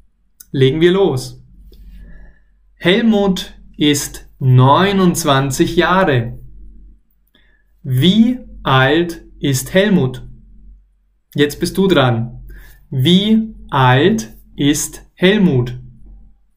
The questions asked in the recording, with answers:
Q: Wie alt ist Helmut?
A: 29. Er ist 29 Jahre alt.